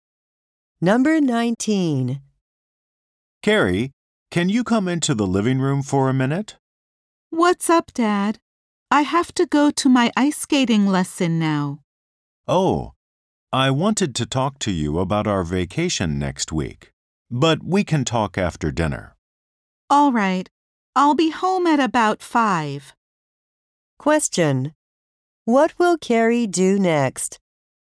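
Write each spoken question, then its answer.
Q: What will Carrie do next?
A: Go to her ice skating lesson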